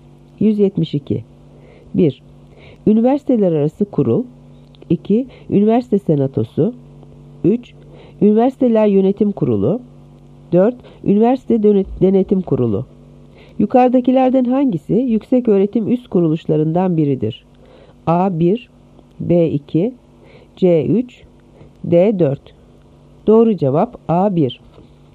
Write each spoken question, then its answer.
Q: Yukarıdakilerden hangisi yükseköğretim üst kuruluşlarından biridir?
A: Doğru cevap A. 1.